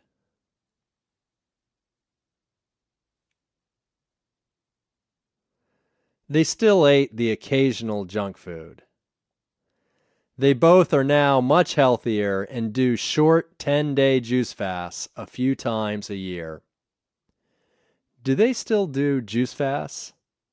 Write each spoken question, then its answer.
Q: Do they still do juice fasts?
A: Yes, they do short 10-day juice fasts a few times a year.